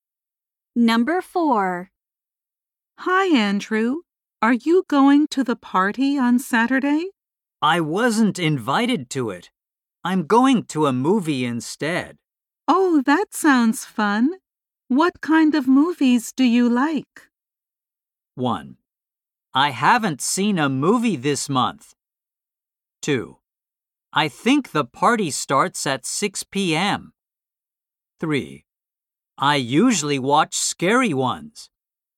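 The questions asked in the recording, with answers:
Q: Oh, that sounds fun. What kind of movies do you like?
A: 3: I usually watch scary ones.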